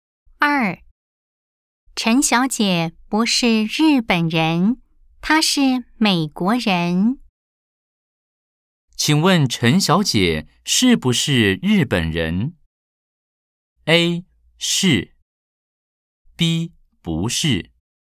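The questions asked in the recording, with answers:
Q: 请问陈小姐是不是日本人?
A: B: 不是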